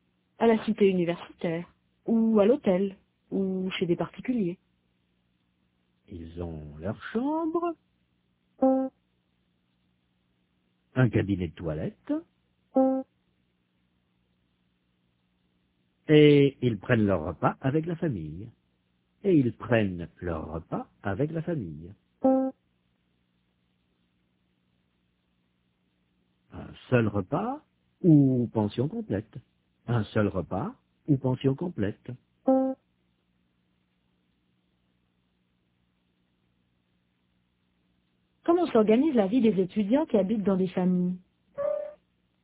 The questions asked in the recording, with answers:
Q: Comment s'organise la vie des étudiants qui habitent dans des familles?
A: Ils ont leur chambre, un cabinet de toilette, et ils prennent leur repas avec la famille.